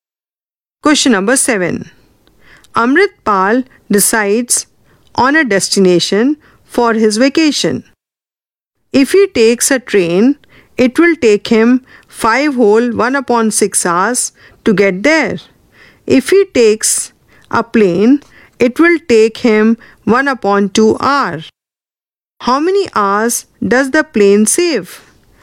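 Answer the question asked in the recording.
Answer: 4 2/3 hours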